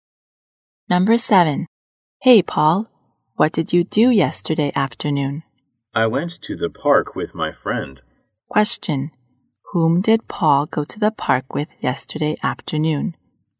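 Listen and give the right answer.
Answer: His friend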